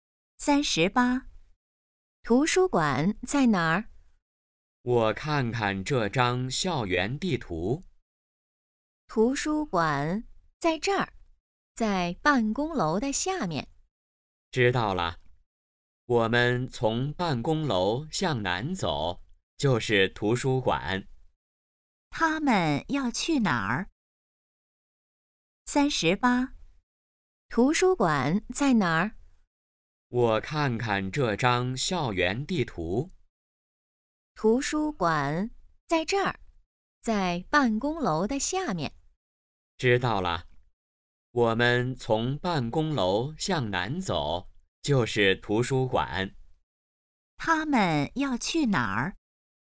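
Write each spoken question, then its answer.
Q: 他们要去哪儿?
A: 图书馆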